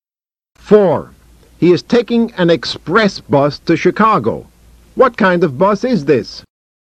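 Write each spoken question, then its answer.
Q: What kind of bus is this?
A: An express bus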